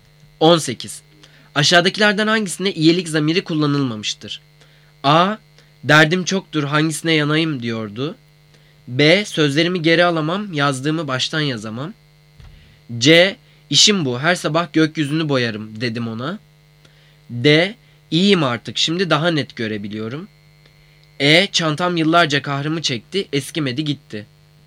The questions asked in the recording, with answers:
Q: Aşağıdakilerden hangisinde iyilik zamiri kullanılmamıştır?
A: Cevap D. İyiyim artık, şimdi daha net görebiliyorum.